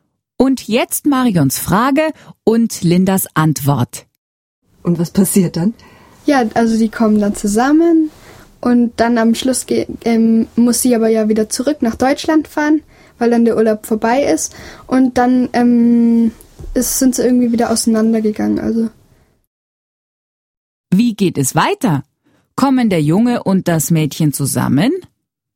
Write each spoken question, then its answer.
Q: Wie geht es weiter? Kommen der Junge und das Mädchen zusammen?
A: Ja, sie kommen zusammen. Aber nur bis ihr Urlaub zu Ende ist.